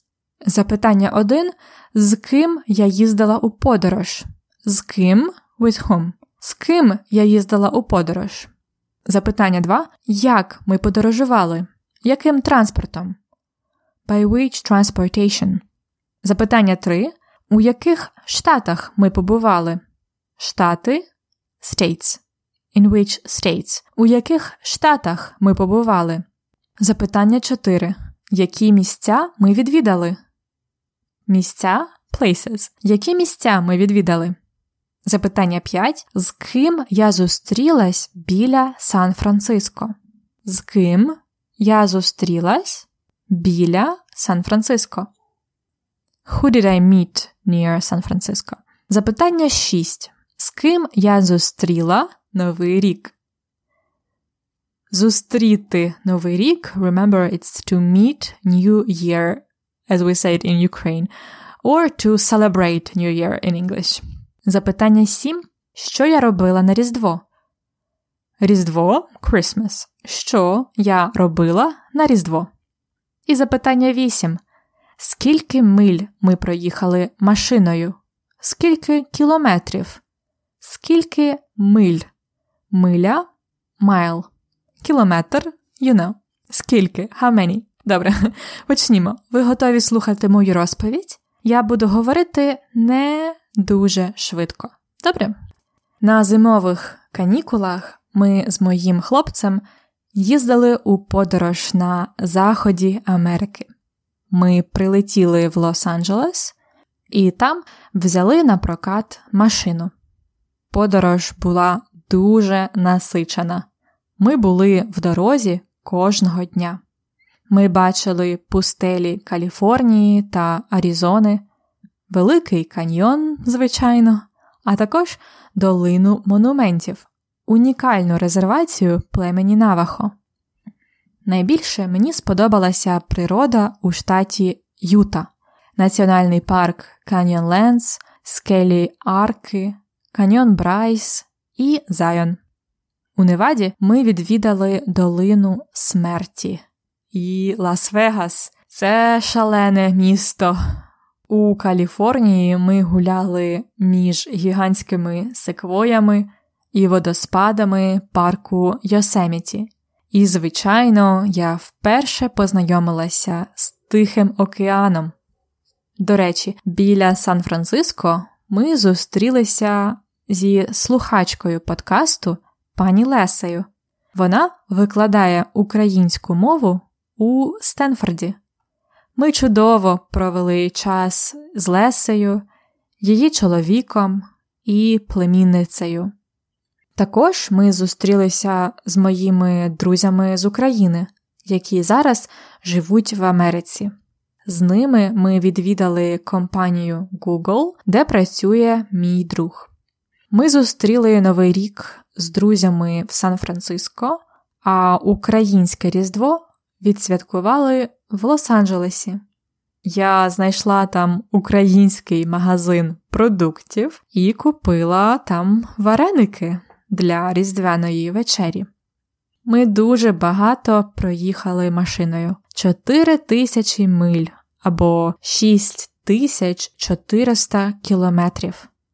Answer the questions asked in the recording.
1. Ти подорожувала зі своїм хлопцем.
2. Ви подорожували літаком і машиною.
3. Ви побували в Каліфорнії, Аризоні, Юті та Неваді.
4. ви відвідали пустелі, національні парки, міста, Тихий океан.
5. ти зустрілась зі слухачкою подкасту, її чоловіком і племінницею.
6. ти зустріла новий рік зі своїм хлопцем і друзями.
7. Так, я знайшла український магазин продуктів в Лос-Анджелесі і купила там вареники на різдвяну вечерю.
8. Ви проїхали 4 тисячі миль.